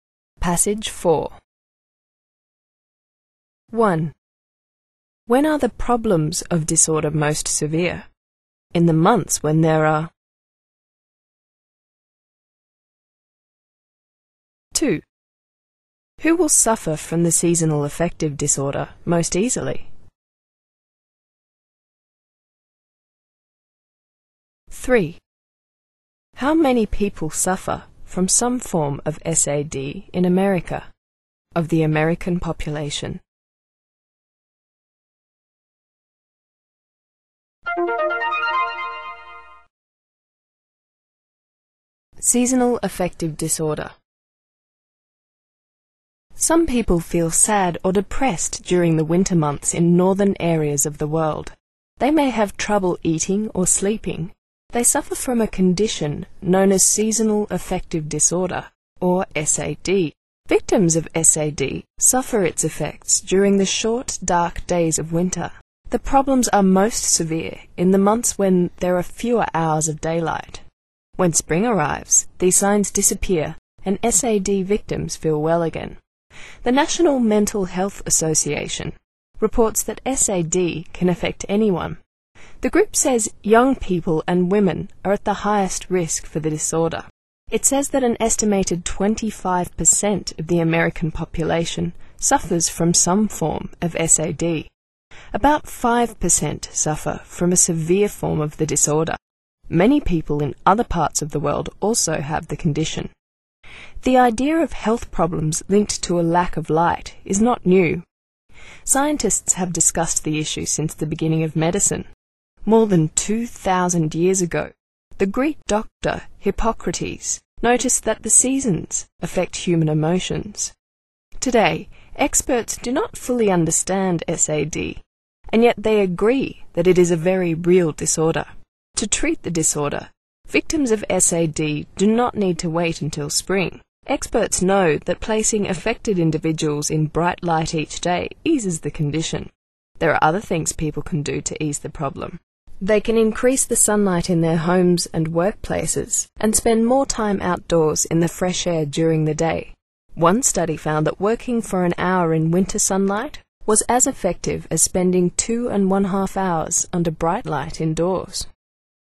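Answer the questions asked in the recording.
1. In the months when there are fewer hours of daylight
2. Young people and women
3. An estimated 25%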